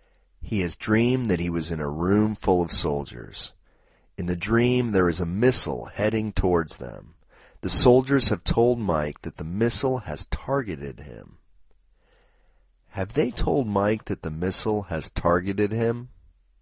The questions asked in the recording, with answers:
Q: Have they told Mike that the missile has targeted him?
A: Yes, they have told Mike that the missile has targeted him.